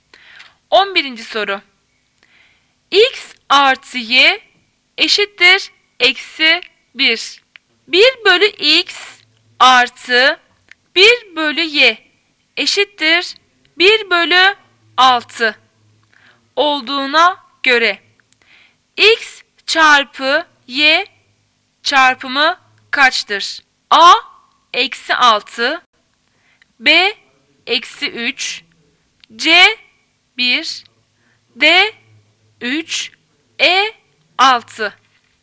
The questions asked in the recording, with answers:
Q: 1 bölü x artı 1 bölü y eşittir 1 bölü 6 olduğuna göre x çarpı y çarpımı kaçtır?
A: Cevap şıkkı A eksi 6.